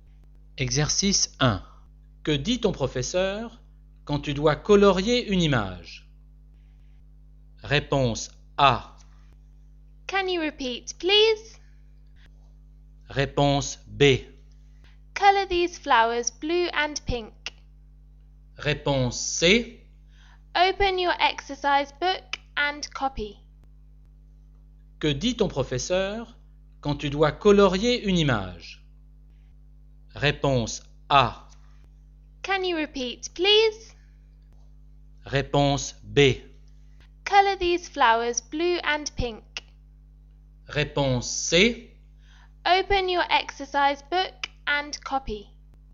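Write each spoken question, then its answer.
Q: Que dit ton professeur quand tu dois colorier une image?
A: B: Color these flowers blue and pink.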